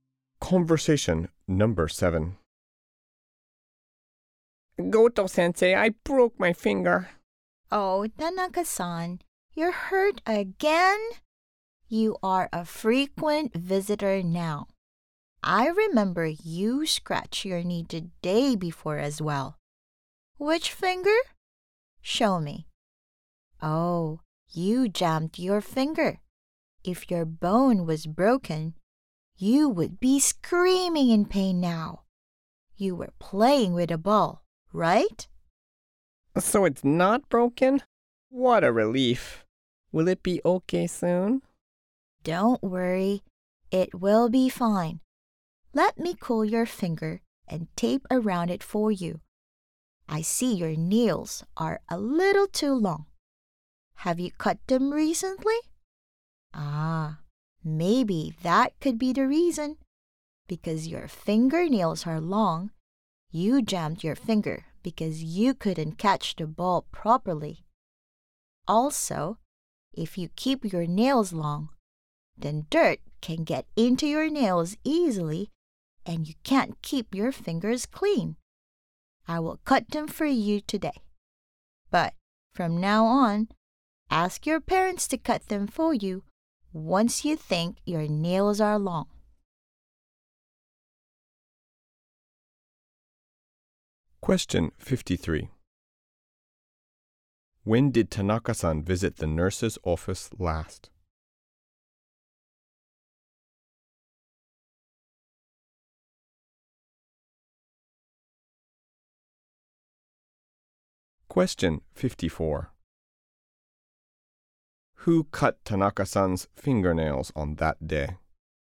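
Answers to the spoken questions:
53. The day before
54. The nurse (Goto-sensei)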